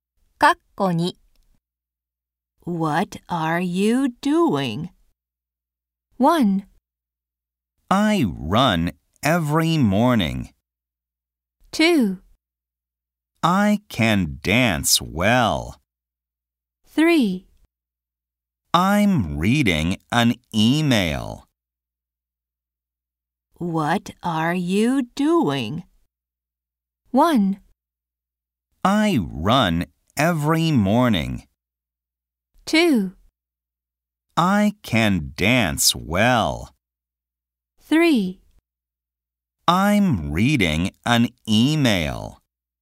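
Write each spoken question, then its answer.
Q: What are you doing?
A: 3: I'm reading an email.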